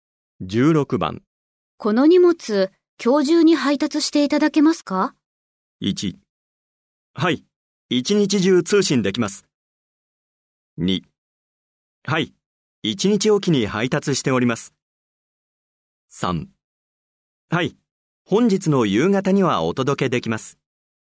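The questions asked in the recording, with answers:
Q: この荷物、今日中に配達していただけますか?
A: 3: はい、本日の夕方にはお届けできます。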